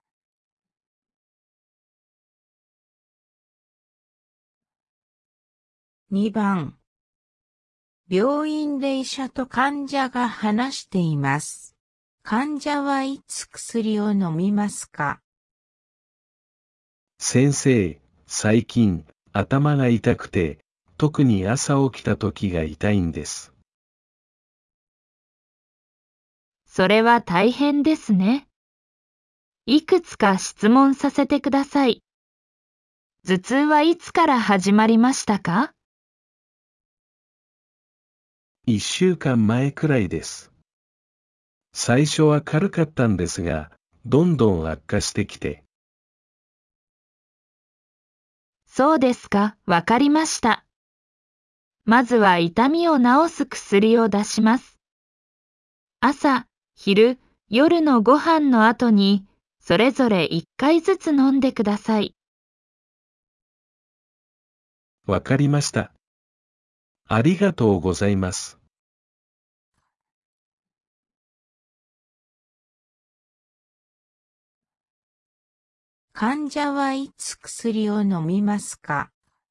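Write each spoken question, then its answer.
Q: 患者はいつ薬を飲みますか?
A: 朝、昼、夜のご飯の後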